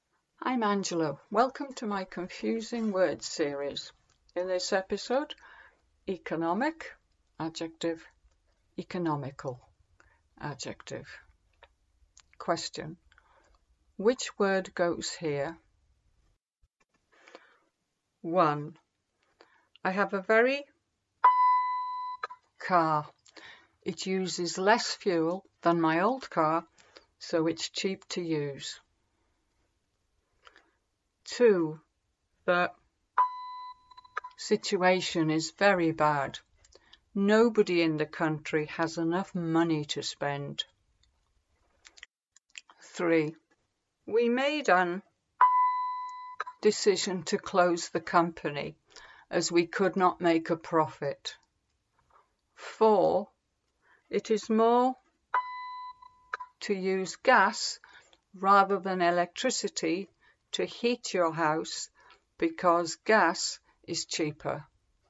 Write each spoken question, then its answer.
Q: I have a very car. It uses less fuel than my old car, so it's cheap to use.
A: I have a very economical car.

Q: The situation is very bad.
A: The economic situation is very bad.

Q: We made an decision to close the company as we could not make a profit.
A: We made an economic decision to close the company as we could not make a profit.

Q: It is more to use gas rather than electricity to heat your house because gas is cheaper.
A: It is more economical to use gas rather than electricity to heat your house because gas is cheaper.